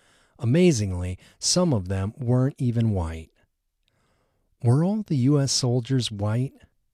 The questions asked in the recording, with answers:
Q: Were all the U.S. soldiers white?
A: No, all of the U.S. soldiers weren't white.